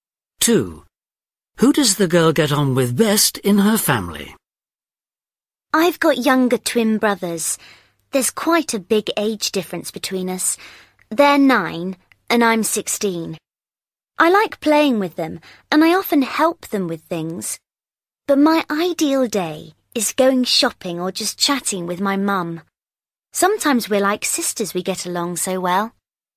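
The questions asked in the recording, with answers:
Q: Who does the girl get on with best in her family?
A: her mum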